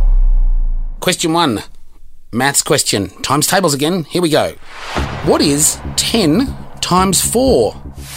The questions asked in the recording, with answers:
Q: What is 10 times 4?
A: 10 times 4 is 40.